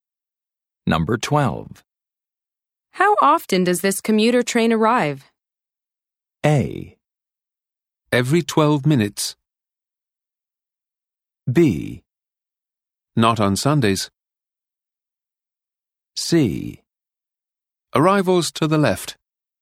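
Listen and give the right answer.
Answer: A: Every 12 minutes.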